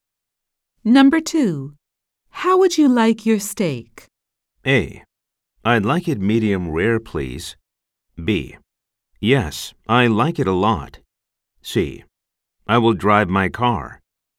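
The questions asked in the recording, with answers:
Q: How would you like your steak?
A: A: I'd like it medium rare, please.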